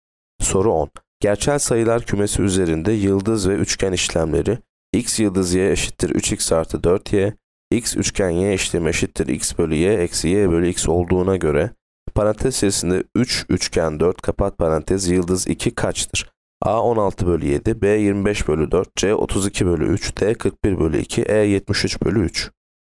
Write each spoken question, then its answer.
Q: Gerçel sayılar kümesi üzerinde yıldız ve üçgen işlemleri x yıldız y eşittir 3x artı 4y, x üçgen y işlemi eşittir x bölü y eksi y bölü x olduğuna göre parantez içerisinde 3 üçgen 4 kapat parantez yıldız 2 kaçtır?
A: Yanıt B 25 bölü 4.